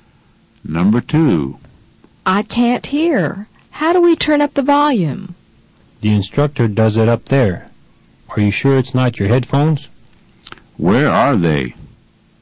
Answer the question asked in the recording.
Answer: They're in the language lab.